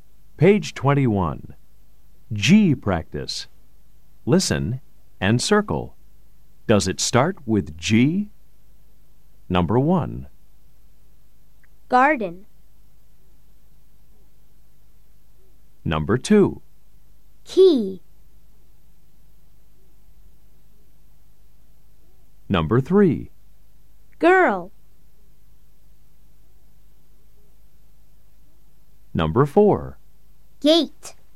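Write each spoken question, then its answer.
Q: Does it start with G? Number 1. Garden.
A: Yes

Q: Number 2. Key.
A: No

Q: Number 3. Girl.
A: Yes

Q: Number 4. Gate.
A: Yes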